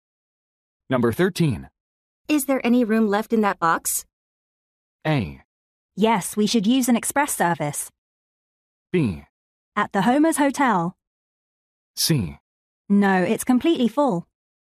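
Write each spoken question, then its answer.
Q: Is there any room left in that box?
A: C: No, it's completely full.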